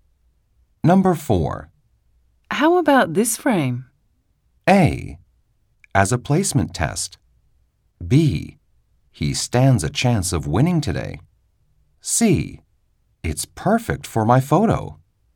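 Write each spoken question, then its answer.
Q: How about this frame?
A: C: It's perfect for my photo.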